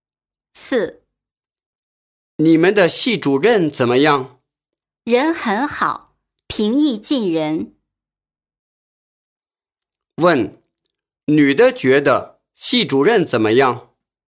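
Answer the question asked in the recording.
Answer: 人很好,平易近人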